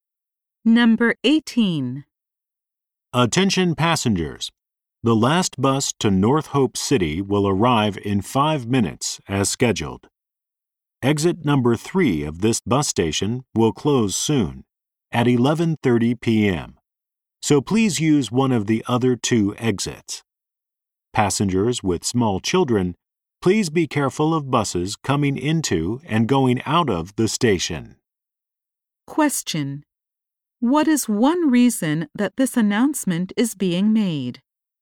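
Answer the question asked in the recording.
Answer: Exit number 3 will close soon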